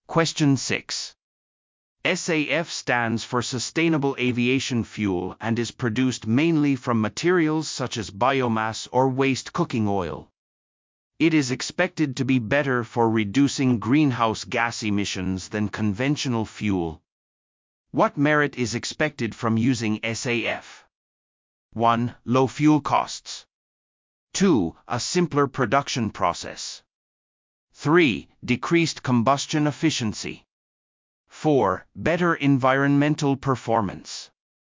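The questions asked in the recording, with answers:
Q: What merit is expected from using SAF?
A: 4: Better environmental performance.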